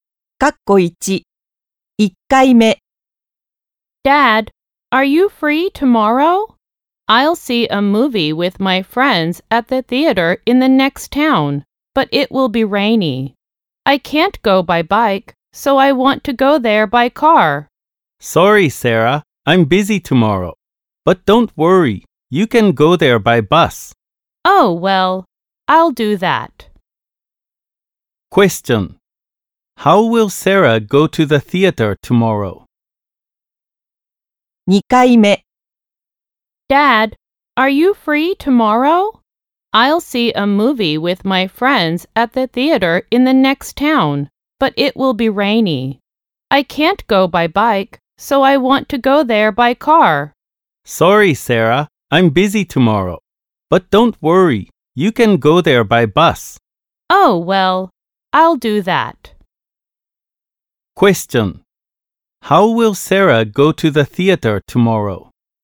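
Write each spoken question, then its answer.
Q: How will Sarah go to the theater tomorrow?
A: By bus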